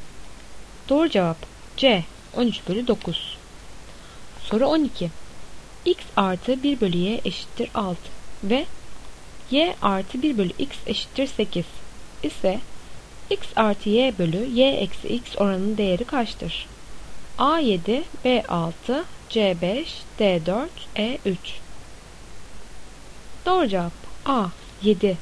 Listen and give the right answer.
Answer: Doğru cevap A 7.